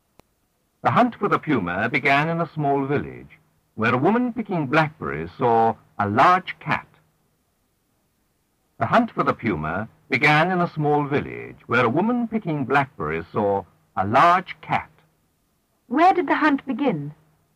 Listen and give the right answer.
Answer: In a small village.